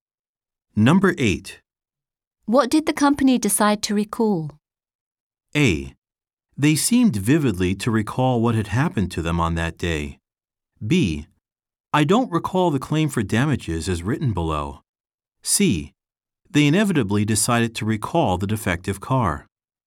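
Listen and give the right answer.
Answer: C: They inevitably decided to recall the defective car.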